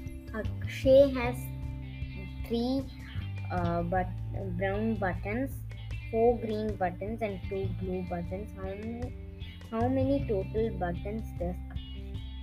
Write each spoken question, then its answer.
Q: How many total buttons does Akshay have?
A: So the number of buttons he has in all is 9.